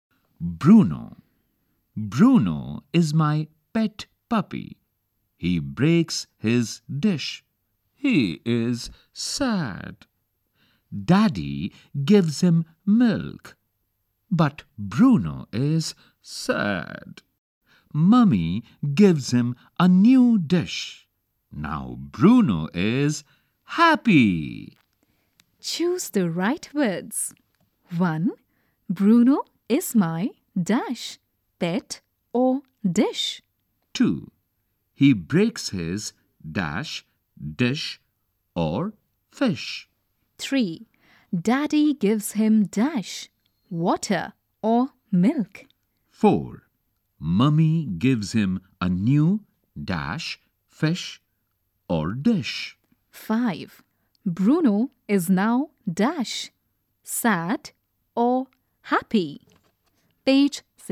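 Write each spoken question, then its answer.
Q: Bruno is my dash, pet or dish.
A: pet

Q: He breaks his dash, dish or fish.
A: dish

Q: Daddy gives him dash, water or milk.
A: milk

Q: Mummy gives him a new dash, fish or dish.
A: dish

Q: Bruno is now dash, sad or happy.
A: happy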